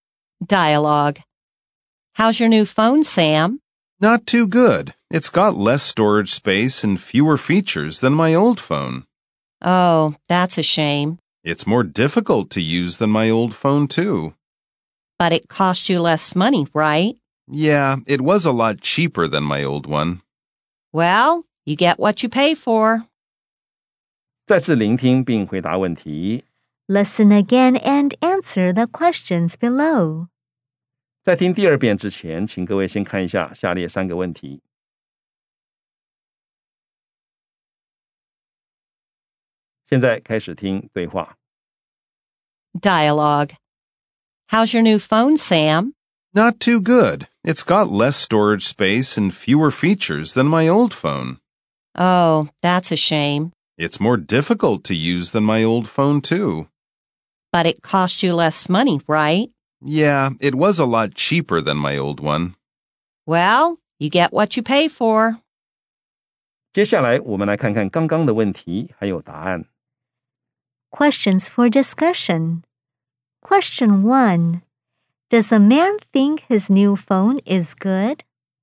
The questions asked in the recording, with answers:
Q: Does the man think his new phone is good?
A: No, he doesn't think it's good.